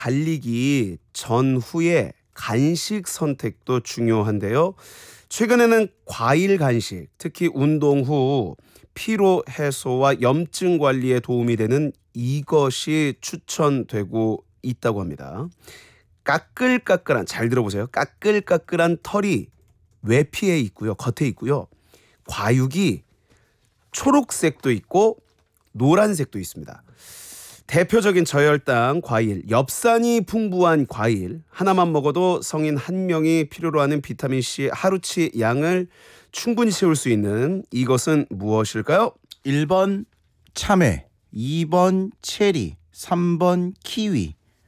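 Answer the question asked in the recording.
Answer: 3: 키위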